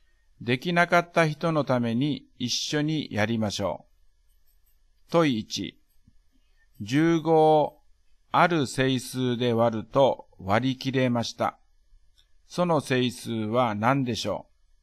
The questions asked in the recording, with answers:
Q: 15をある整数で割ると割り切れました。 その整数は何でしょう?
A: だから、1か3か5か15です。